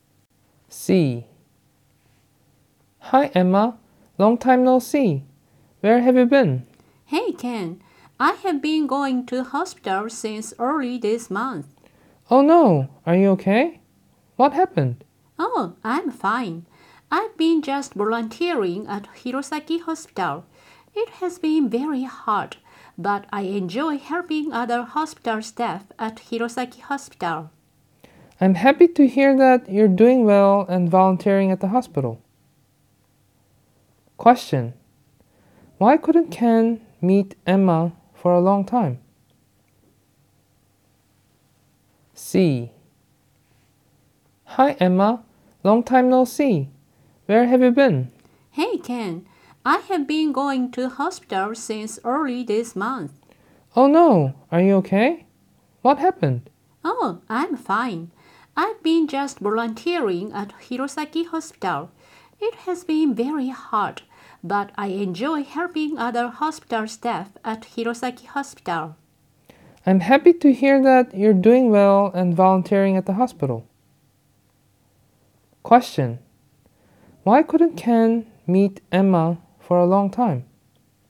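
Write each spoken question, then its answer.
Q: Why couldn't Ken meet Emma for a long time?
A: Because Emma has been volunteering at Hirosaki Hospital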